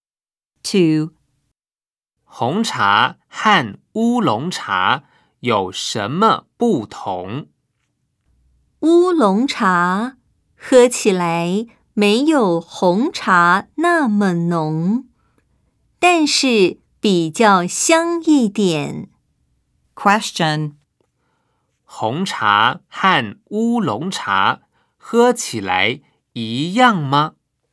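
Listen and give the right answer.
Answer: 不一样,乌龙茶没有红茶那么浓,但比较香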